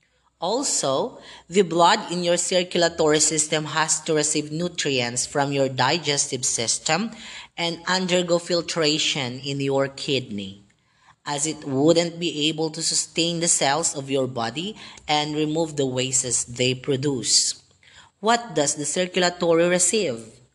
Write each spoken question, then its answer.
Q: What does the circulatory receive?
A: You are correct if you say nutrients.